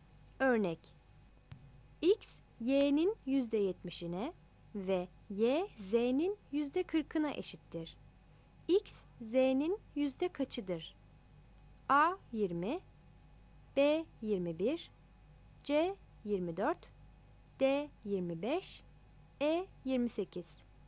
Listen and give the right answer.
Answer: Yanıt E'dir.